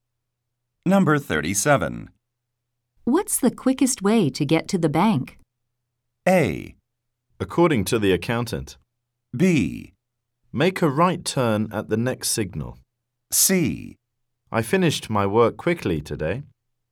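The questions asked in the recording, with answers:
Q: What's the quickest way to get to the bank?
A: B: Make a right turn at the next signal.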